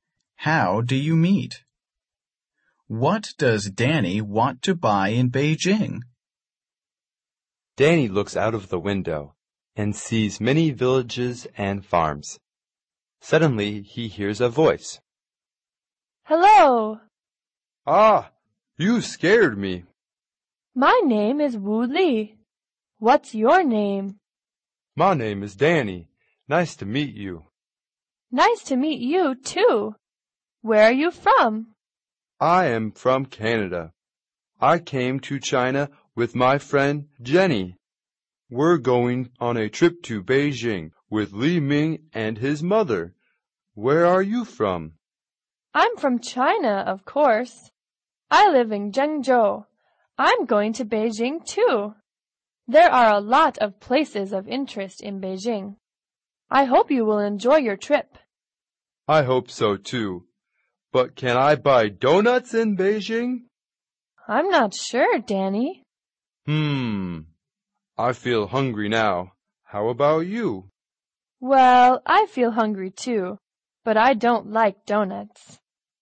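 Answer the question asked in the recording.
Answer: Donuts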